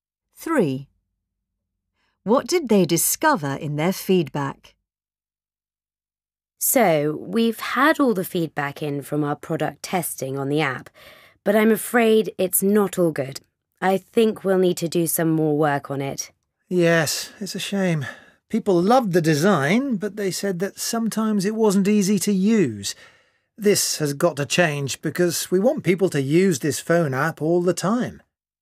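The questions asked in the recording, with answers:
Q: What did they discover in their feedback?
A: The app was sometimes not easy to use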